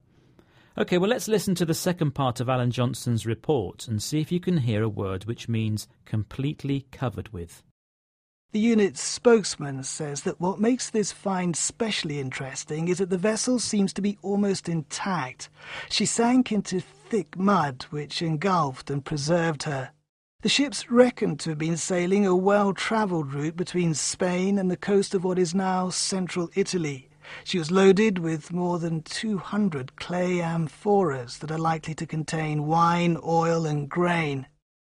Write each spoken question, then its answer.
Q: see if you can hear a word which means completely covered with.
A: That word was engulfed.